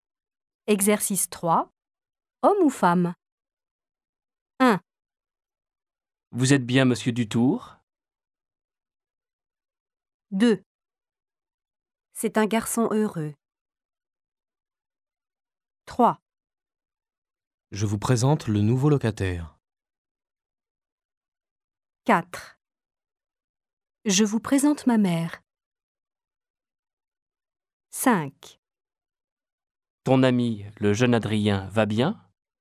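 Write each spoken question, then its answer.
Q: Homme ou femme ?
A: Homme

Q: Homme ou femme ?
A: Homme

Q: Homme ou femme ?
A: Homme

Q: Homme ou femme ?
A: Femme

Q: Homme ou femme ?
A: Homme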